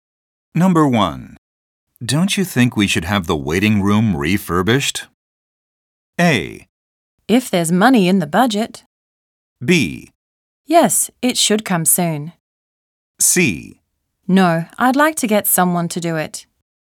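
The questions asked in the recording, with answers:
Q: Don't you think we should have the waiting room refurbished?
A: A: If there's money in the budget.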